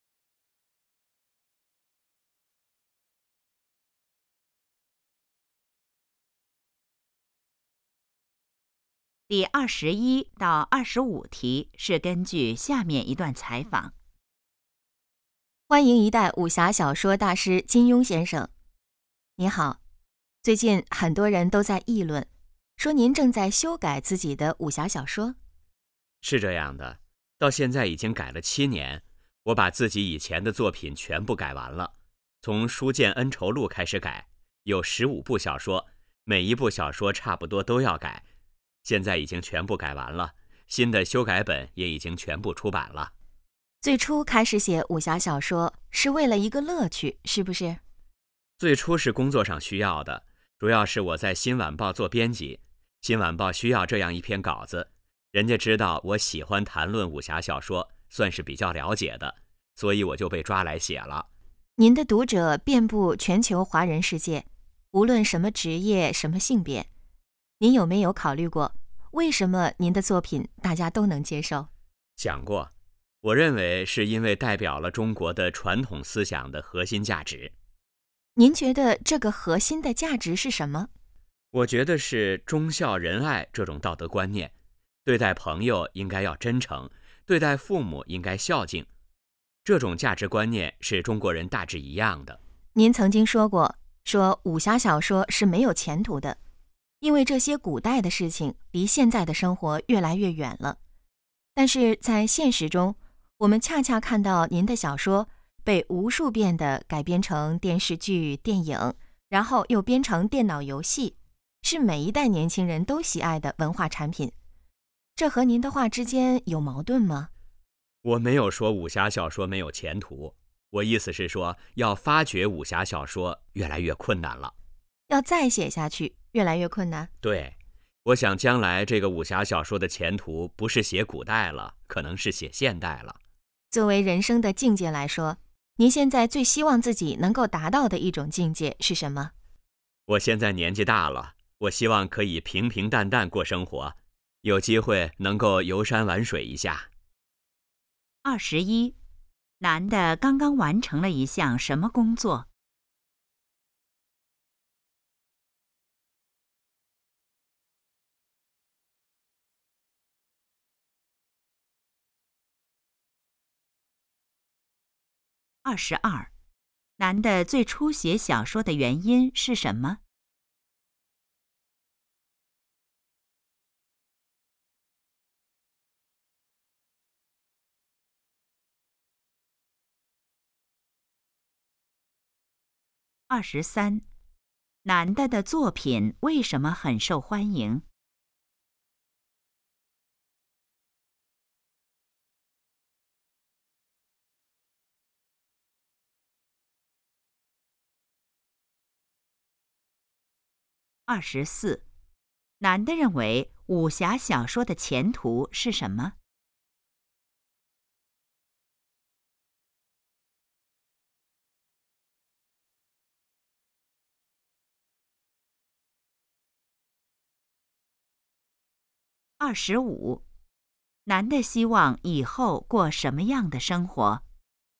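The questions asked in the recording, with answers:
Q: 男的刚刚完成了一项什么工作?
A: 修改自己以前的武侠小说

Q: 男的最初写小说的原因是什么?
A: 工作需要,新晚报需要稿子

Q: 男的的作品为什么很受欢迎?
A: 代表了中国传统思想的核心价值

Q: 男的认为武侠小说的前途是什么?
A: 可能是写现代

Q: 男的希望以后过什么样的生活?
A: 平平淡淡,游山玩水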